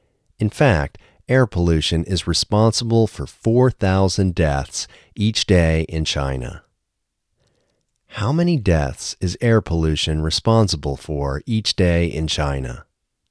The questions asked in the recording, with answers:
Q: How many deaths is air pollution responsible for each day in China?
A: Air pollution is responsible for 4,000 deaths each day in China.